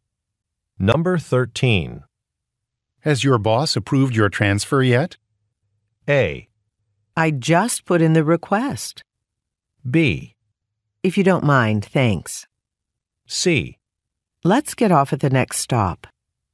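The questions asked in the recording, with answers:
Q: Has your boss approved your transfer yet?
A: A: I just put in the request.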